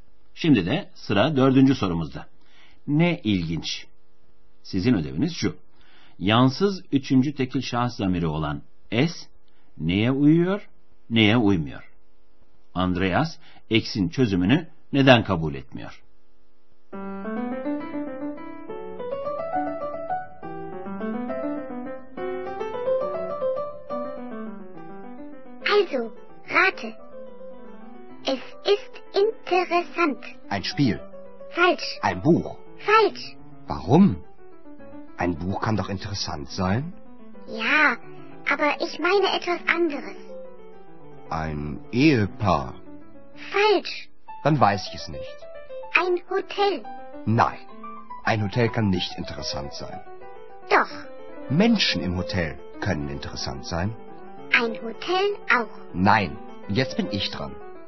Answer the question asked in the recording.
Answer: Oteldeki insanlar ilginç olabilir.